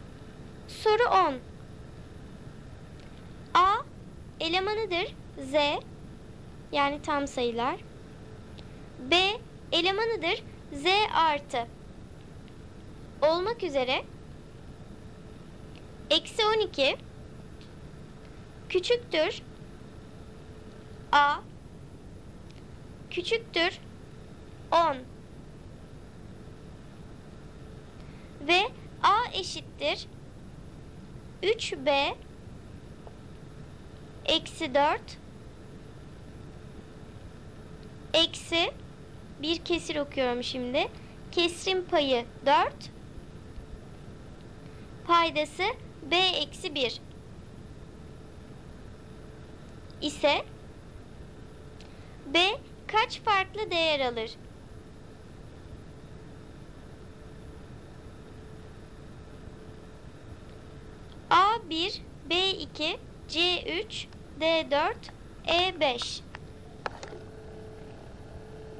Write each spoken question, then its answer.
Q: ise B kaç farklı değer alır?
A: Doğru cevap B 2.